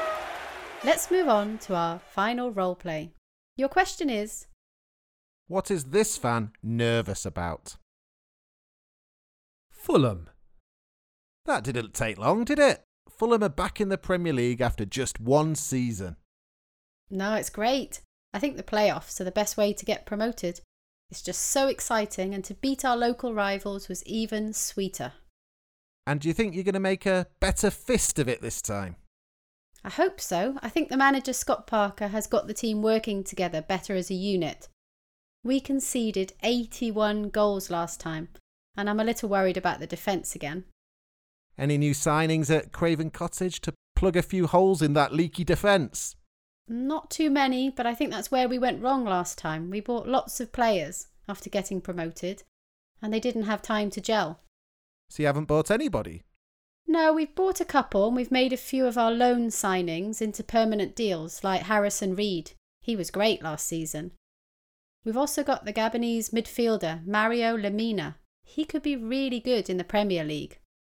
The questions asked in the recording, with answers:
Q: what is this fan nervous about?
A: She said she was worried about Fulham's defence.